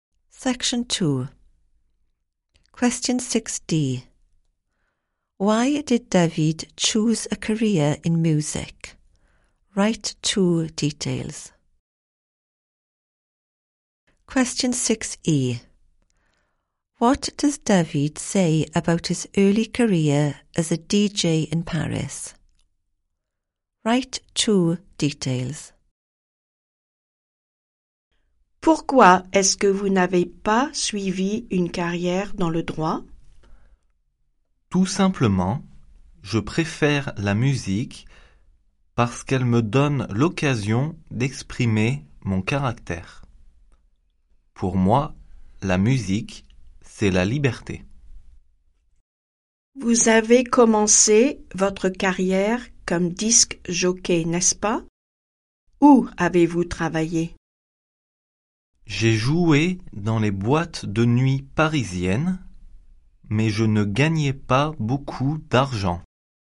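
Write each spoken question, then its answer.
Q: Why did David choose a career in music?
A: It lets him express his character; music is freedom

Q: What does David say about his early career as a DJ in Paris?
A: Played in Paris nightclubs; didn't earn much money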